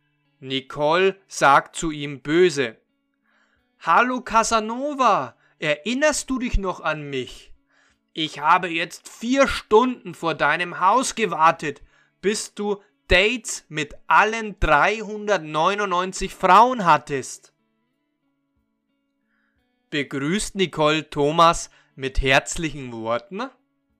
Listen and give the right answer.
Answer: Nein, sie begrüßt ihn nicht mit herzlichen Worten.